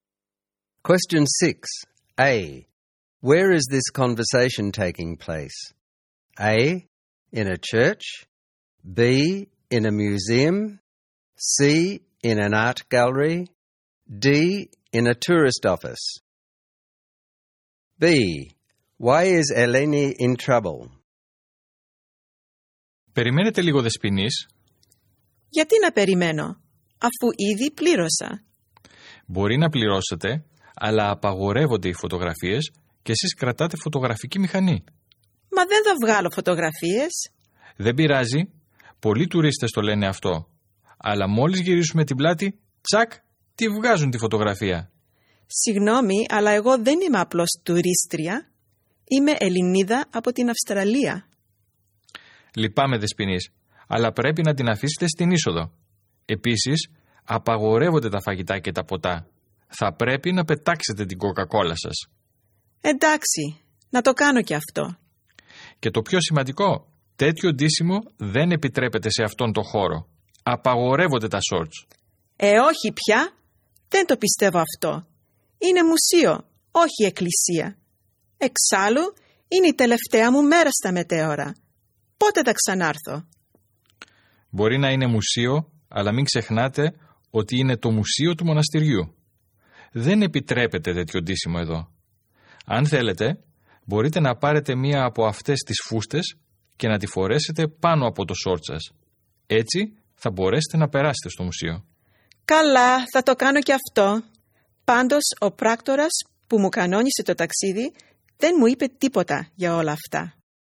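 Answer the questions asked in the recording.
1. B: In a museum.
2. She has a camera, a Coca-Cola and is wearing shorts, which are not allowed in the monastery museum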